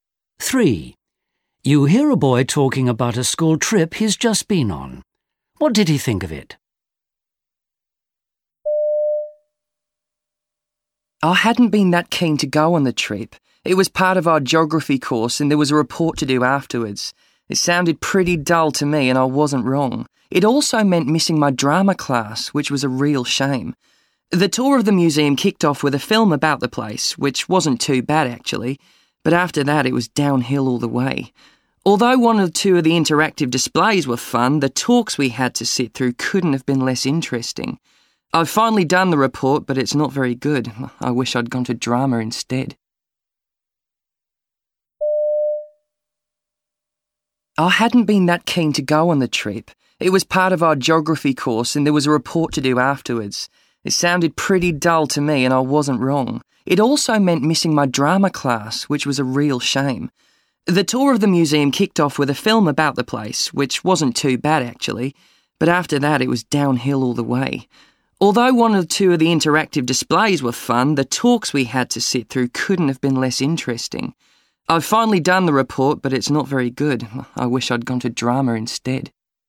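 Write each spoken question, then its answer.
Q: What did he think of it?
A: It was mostly boring, as he expected.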